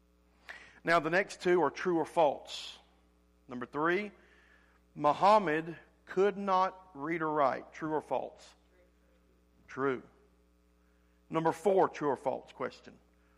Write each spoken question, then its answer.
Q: Muhammad could not read or write.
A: True.